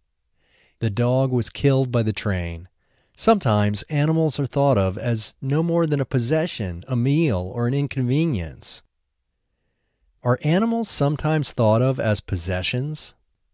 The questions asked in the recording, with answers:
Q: Are animals sometimes thought of as possessions?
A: Yes, animals are sometimes thought of as possessions.